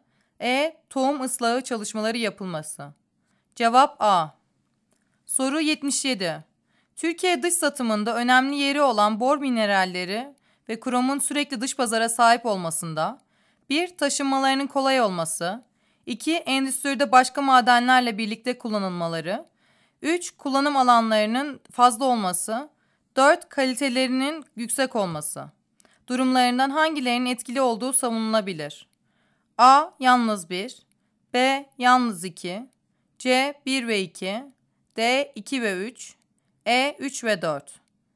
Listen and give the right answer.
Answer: Cevap E.